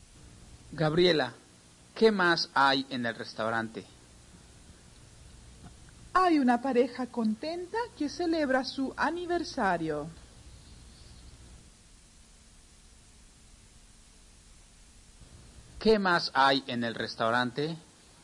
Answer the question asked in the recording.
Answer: Hay una pareja contenta que celebra su aniversario.